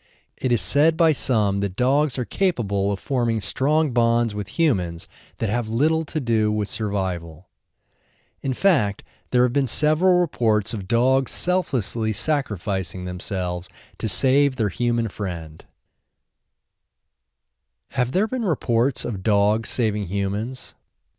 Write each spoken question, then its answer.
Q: Have there been reports of dogs saving humans?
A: Yes, there have been reports of dogs saving humans.